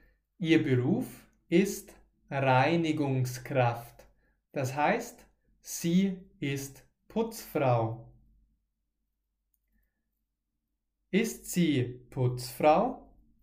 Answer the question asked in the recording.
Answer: Ja, genau. Sie ist Putzfrau.